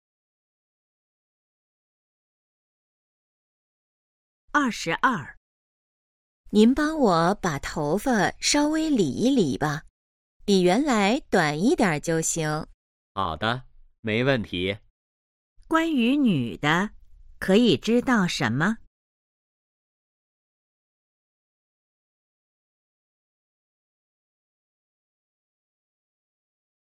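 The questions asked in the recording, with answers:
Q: 关于女的,可以知道什么?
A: 想理发,剪短一点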